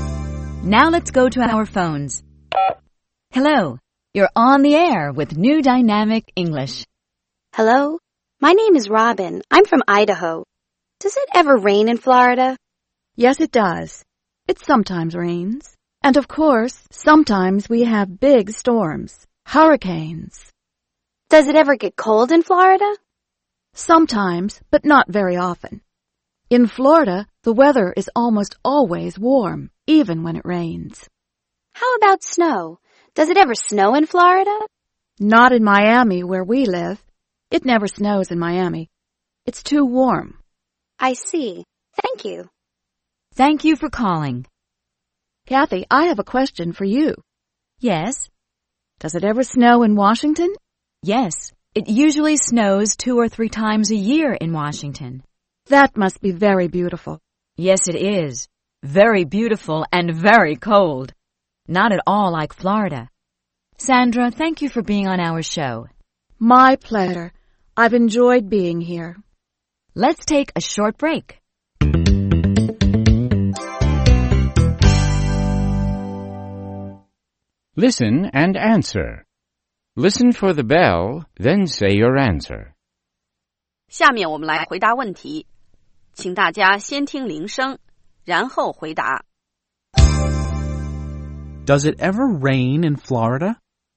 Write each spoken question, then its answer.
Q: Does it ever rain in Florida?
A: Yes, it does. It sometimes rains.